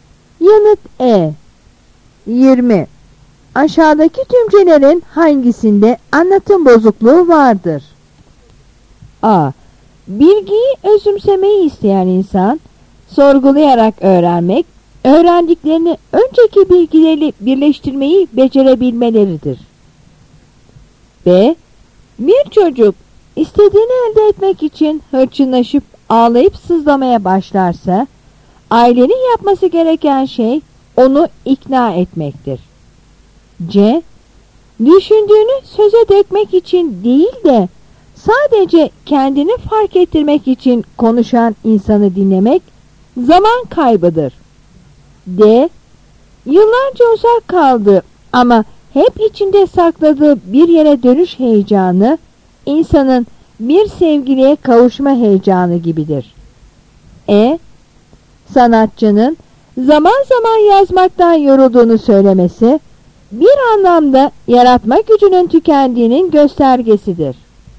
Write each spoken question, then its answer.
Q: Aşağıdaki tümcelerin hangisinde anlatım bozukluğu vardır?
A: Yanıt A.